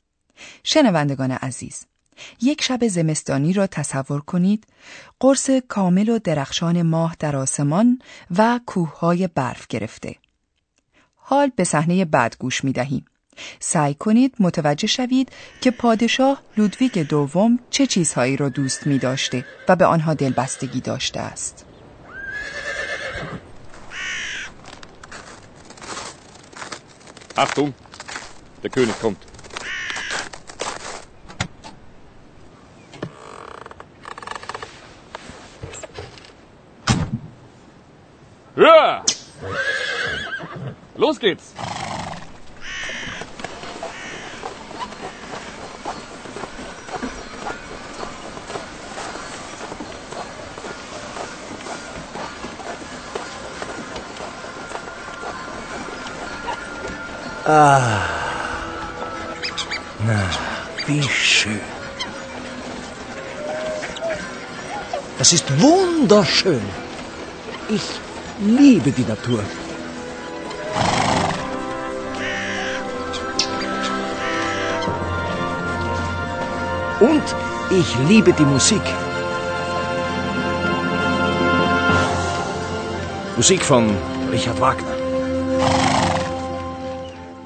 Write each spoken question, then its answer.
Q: سعی کنید متوجه شوید که پادشاه لودویگ دوم چه چیزهایی را دوست می داشته و به آنها دلبستگی داشته است.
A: پادشاه لودویک شیفته موزیک بود.